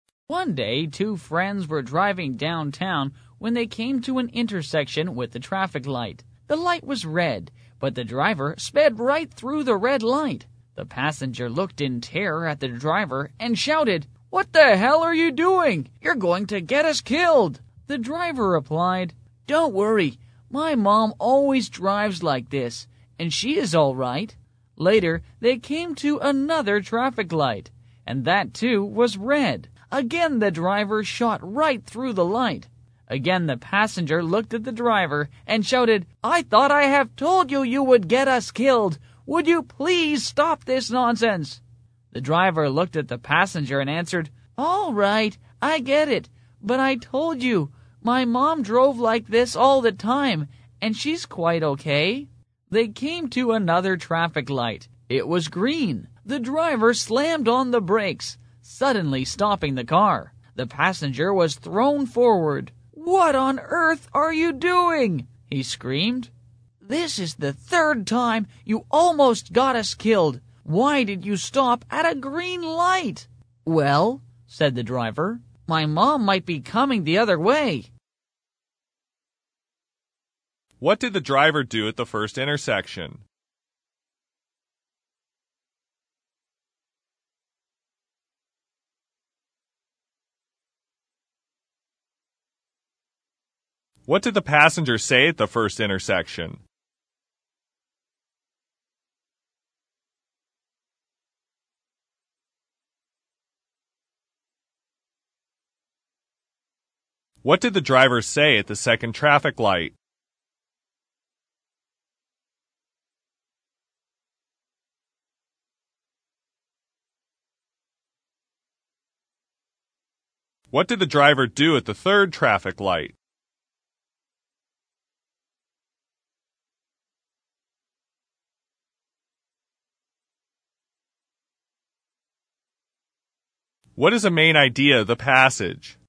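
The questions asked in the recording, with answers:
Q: What did the driver do at the first intersection?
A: He sped right through the red light.

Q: What did the passenger say at the first intersection?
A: "What the hell are you doing? You're going to get us killed!"

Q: What did the driver say at the second traffic light?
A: "All right, I get it. But my mom drove like this all the time, and she's quite okay."

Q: What did the driver do at the third traffic light?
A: He slammed on the brakes and stopped at the green light.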